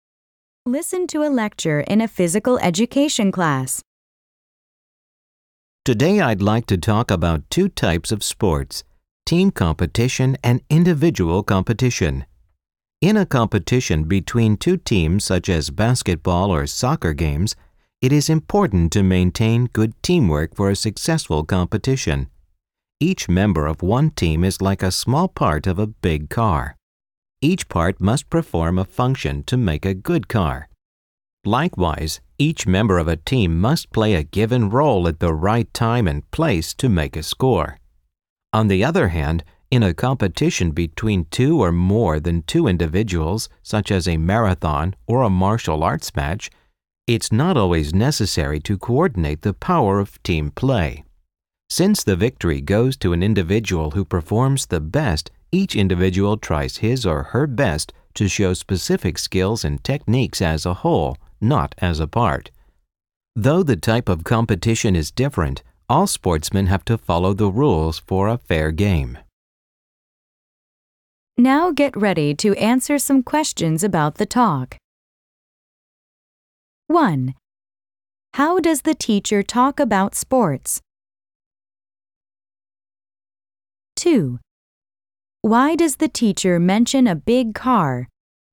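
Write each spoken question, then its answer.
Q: How does the teacher talk about sports?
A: By comparing team competition and individual competition

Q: Why does the teacher mention a big car?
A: To show that each team member must play a role, like each part of a car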